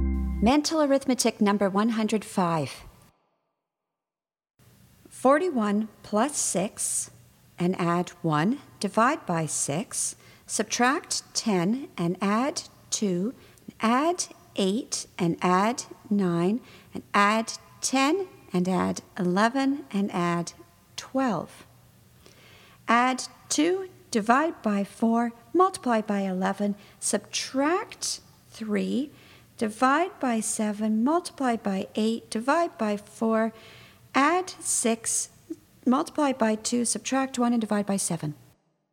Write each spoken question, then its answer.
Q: 41 plus 6 and add 1, divide by 6, subtract 10 and add 2, add 8 and add 9, and add 10 and add 11 and add 12. Add 2, divide by 4, multiply by 11, subtract 3, divide by 7, multiply by 8, divide by 4, add 6, multiply by 2, subtract 1, and divide by 7.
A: And the answer is 13.